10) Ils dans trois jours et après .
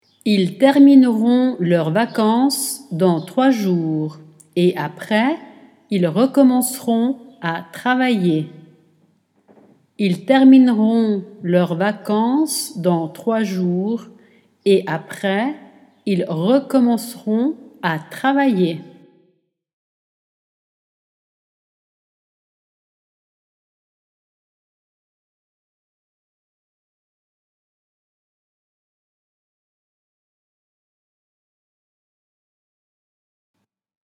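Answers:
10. termineront leurs vacances / ils recommenceront à travailler

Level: Dettato di francese A2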